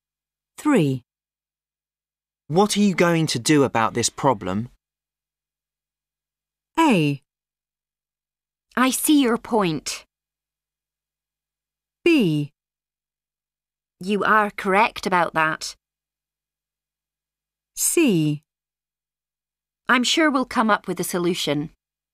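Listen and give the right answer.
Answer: C: I'm sure we'll come up with a solution.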